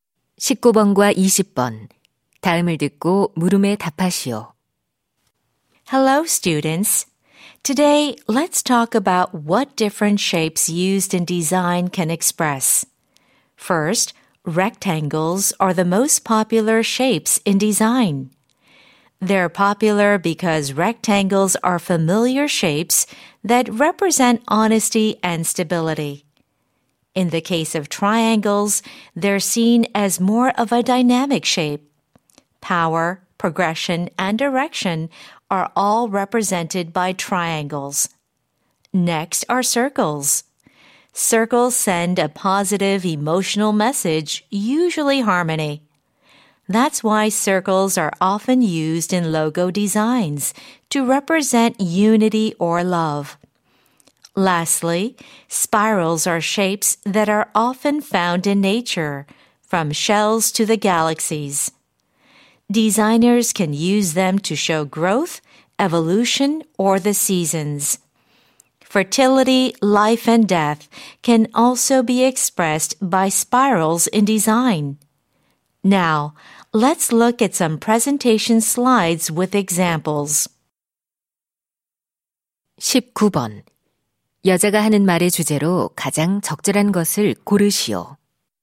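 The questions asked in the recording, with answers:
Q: 여자가 하는 말의 주제로 가장 적절한 것을 고르시오.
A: 디자인에 쓰이는 여러 모양이 표현하는 의미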